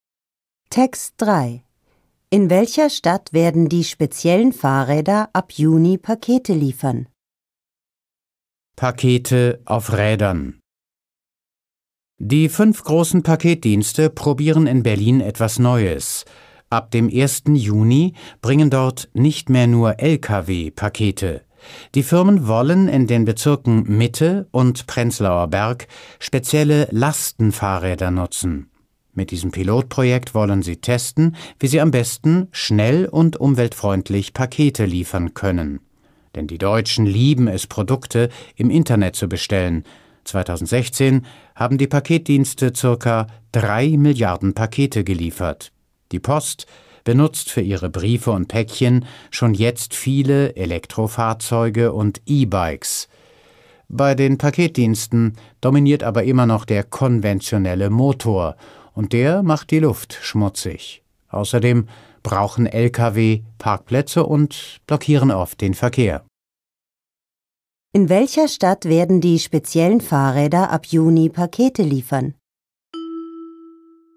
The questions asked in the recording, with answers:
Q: In welcher Stadt werden die speziellen Fahrräder ab Juni Pakete liefern?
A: In Berlin.